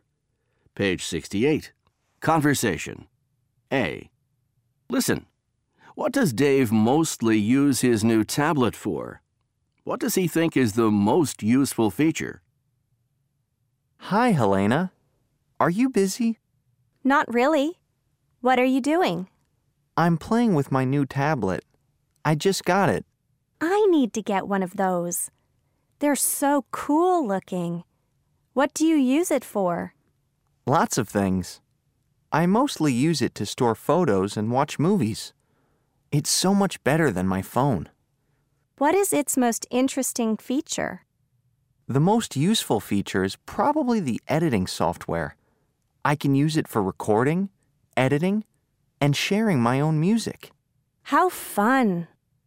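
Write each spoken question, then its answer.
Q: What does Dave mostly use his new tablet for?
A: To store photos and watch movies

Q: What does he think is the most useful feature?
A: The editing software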